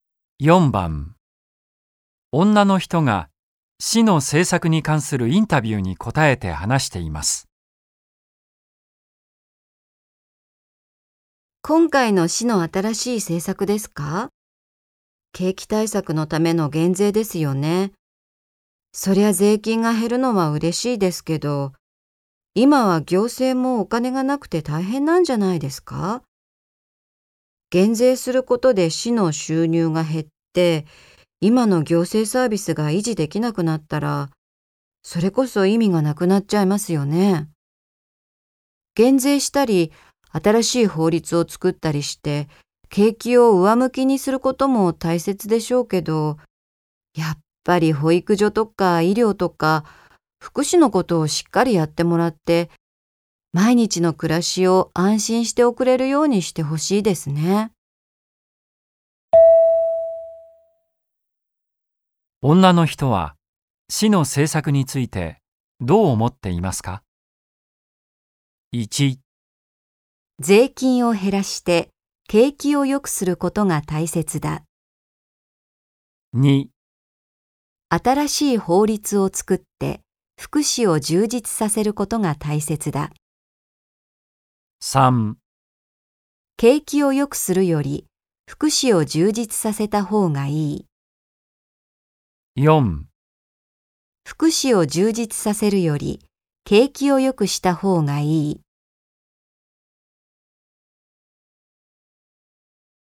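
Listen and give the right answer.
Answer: 3: 景気を良くするより福祉を充実させた方がいい。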